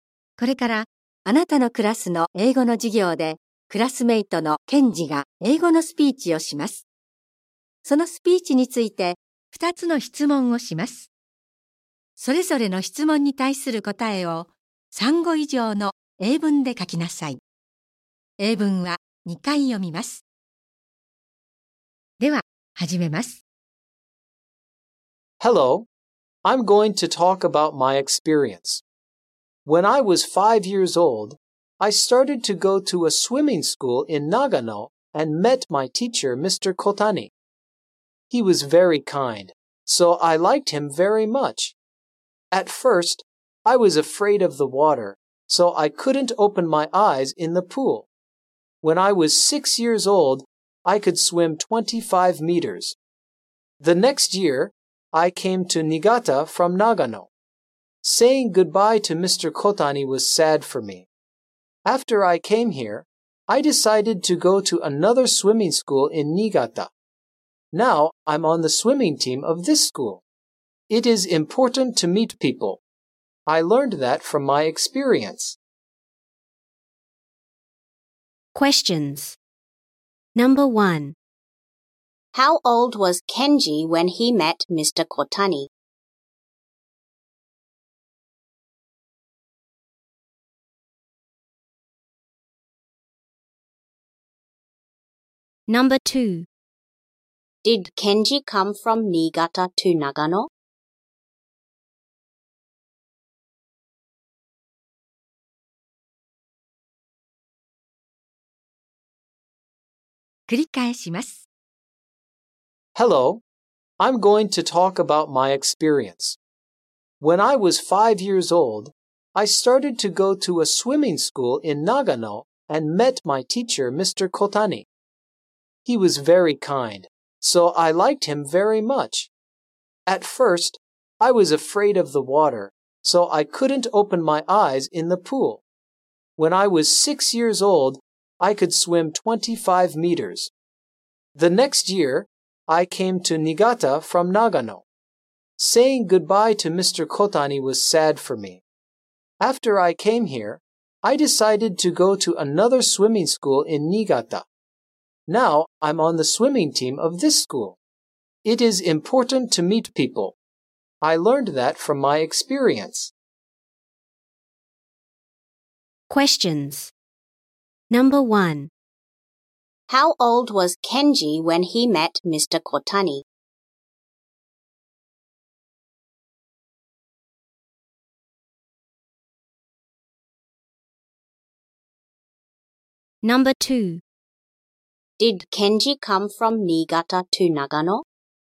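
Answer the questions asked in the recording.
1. He was five years old.
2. No, he didn't.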